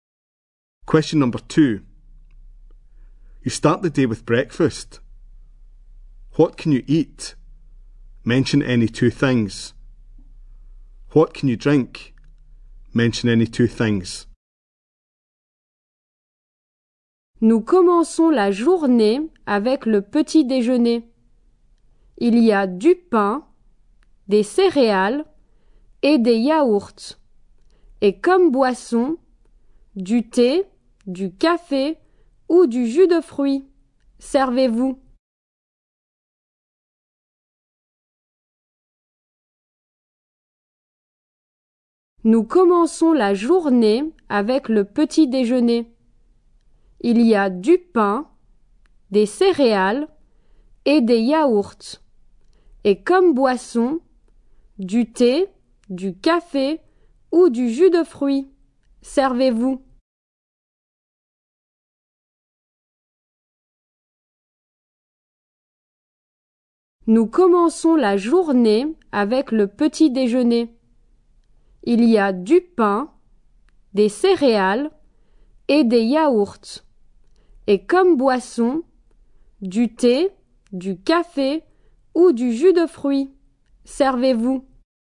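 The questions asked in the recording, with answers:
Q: What can you eat? Mention any two things.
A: Two of: bread, cereal, yoghurts

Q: What can you drink? Mention any two things.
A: Two of: tea, coffee, fruit juice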